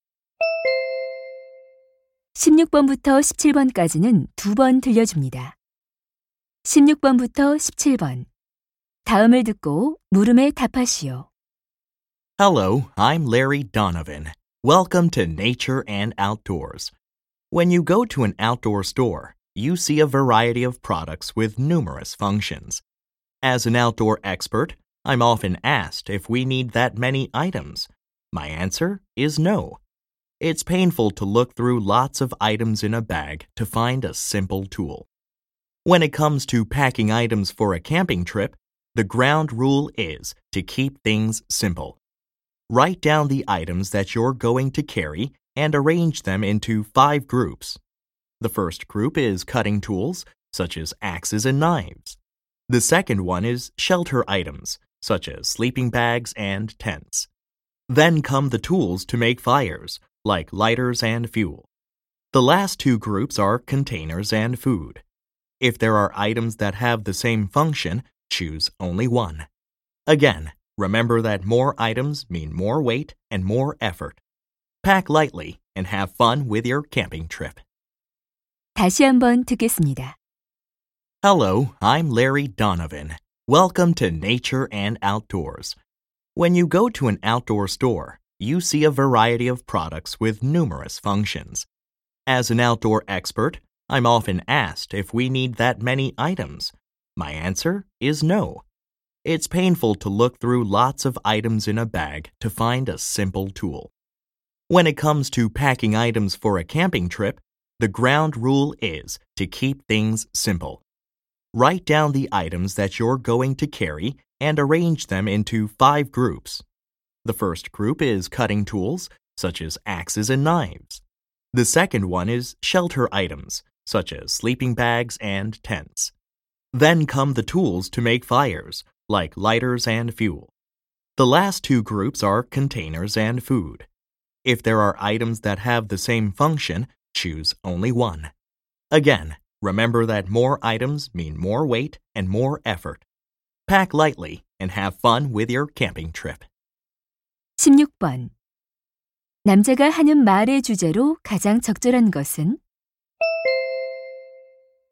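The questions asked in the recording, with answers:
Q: 남자가 하는 말의 주제로 가장 적절한 것은?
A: 캠핑 짐을 간단하게 싸는 방법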